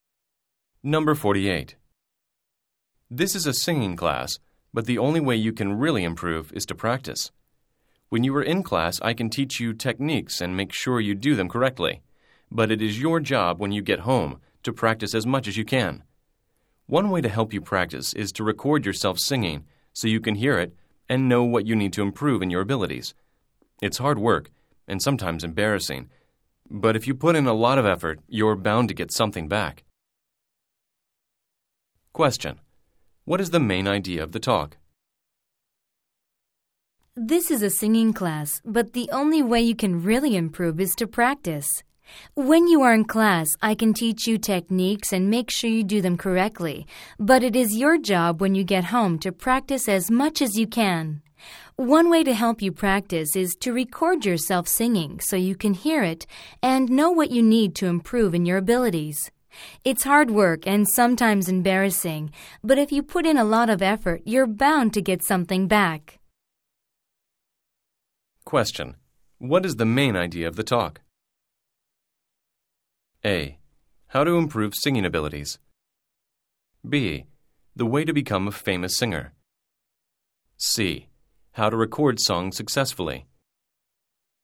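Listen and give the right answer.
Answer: A: How to improve singing abilities.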